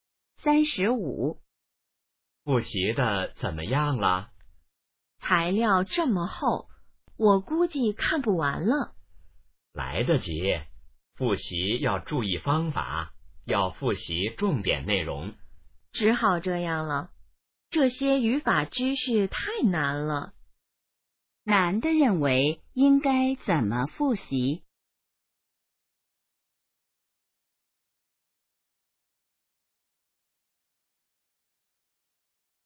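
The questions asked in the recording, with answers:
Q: 男的认为应该怎么复习?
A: 复习重点内容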